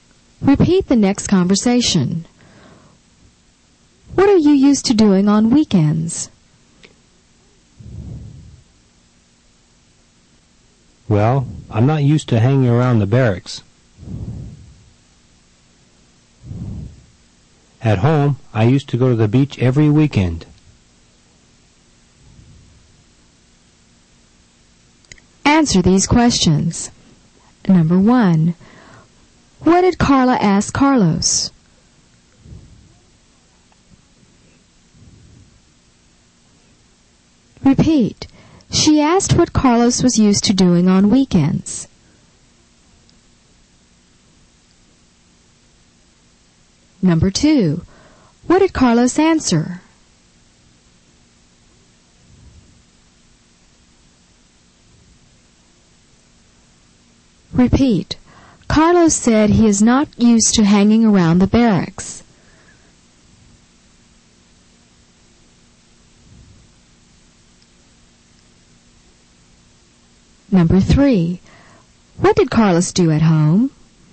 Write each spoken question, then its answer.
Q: What did Carla ask Carlos?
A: She asked what Carlos was used to doing on weekends.

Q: What did Carlos answer?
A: Carlos said he is not used to hanging around the barracks.

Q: What did Carlos do at home?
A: He used to go to the beach every weekend.